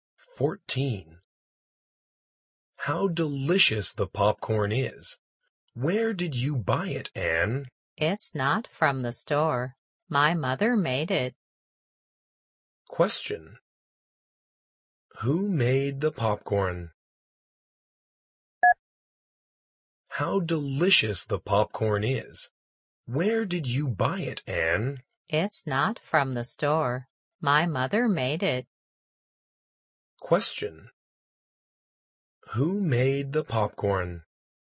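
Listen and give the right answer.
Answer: Anne's mother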